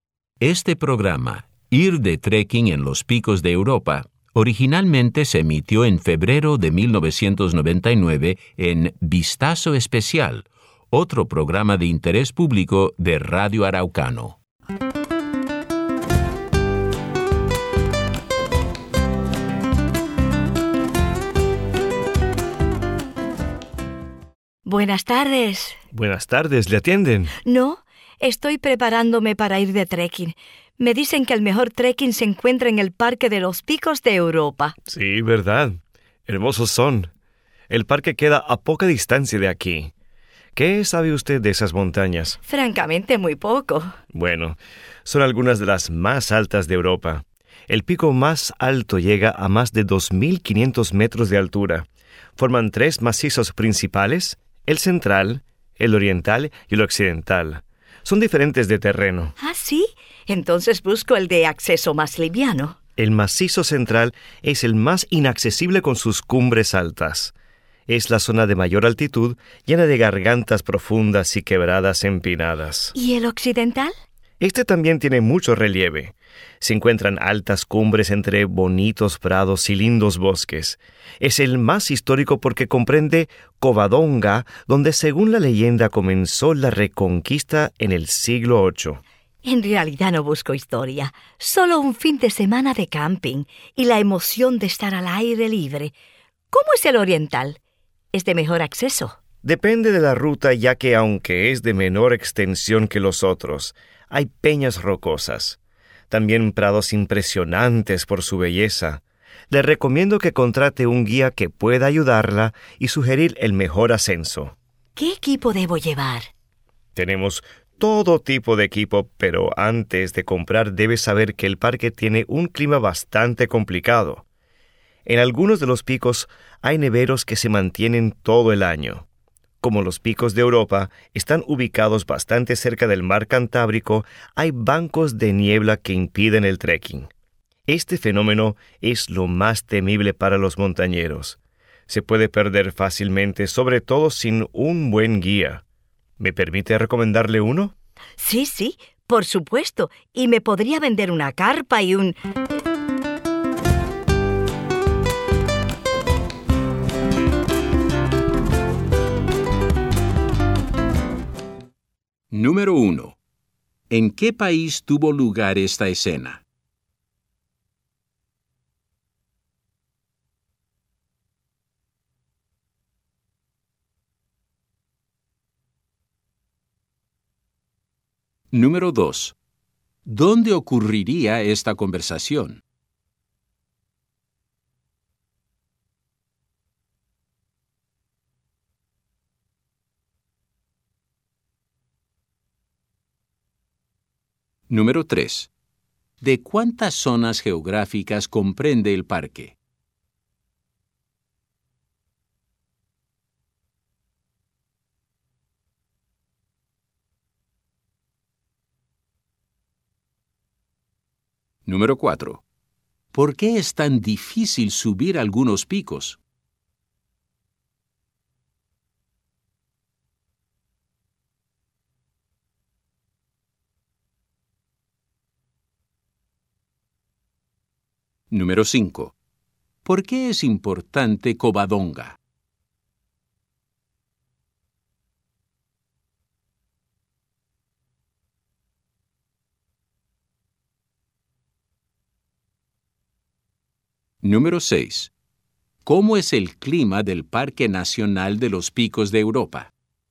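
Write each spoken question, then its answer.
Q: ¿Dónde ocurriría esta conversación?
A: En una tienda de equipo de trekking

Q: ¿De cuántas zonas geográficas comprende el parque?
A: Tres macizos: el central, el oriental y el occidental

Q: ¿Por qué es importante Covadonga?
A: Según la leyenda, allí comenzó la Reconquista en el siglo VIII

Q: ¿Cómo es el clima del Parque Nacional de los Picos de Europa?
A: Complicado: hay neveros todo el año y bancos de niebla por la cercanía al mar Cantábrico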